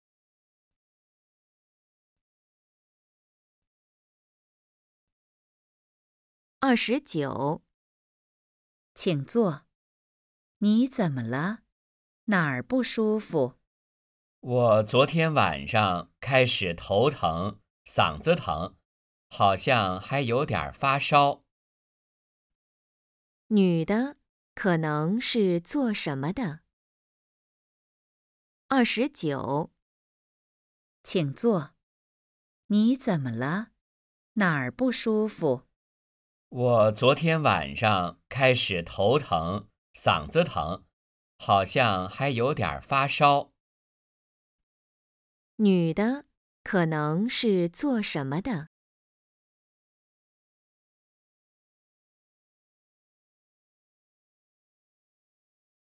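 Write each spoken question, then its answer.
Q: 女的可能是做什么的?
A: 医生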